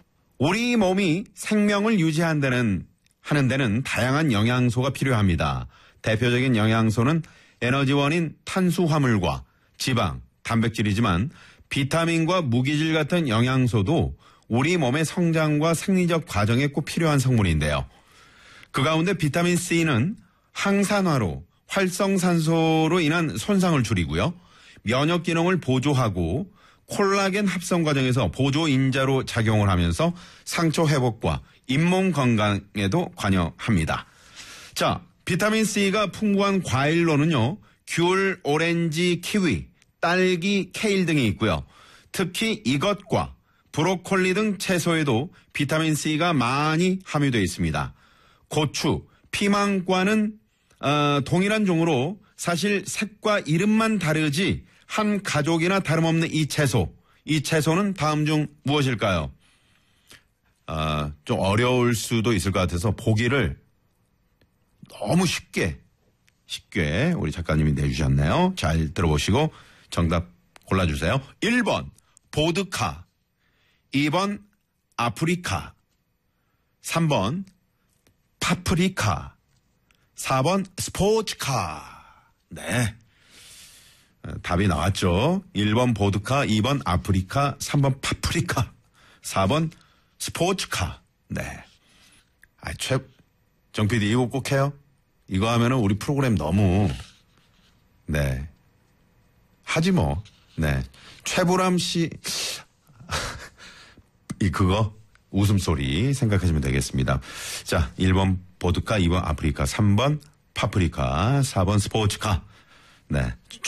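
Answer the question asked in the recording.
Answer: 3번: 파프리카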